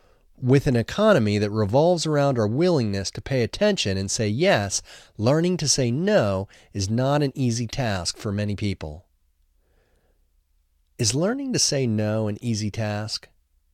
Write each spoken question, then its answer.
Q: Is learning to say no an easy task?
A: No, learning to say no is not an easy task for many people.